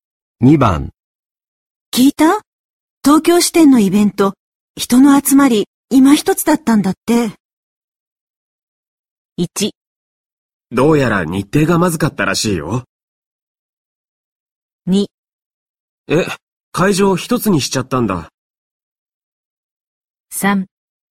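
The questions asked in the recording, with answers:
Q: 聞いた?東京支店のイベント、人の集まり、今一つだったんだって。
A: 1: どうやら日程がまずかったらしいよ。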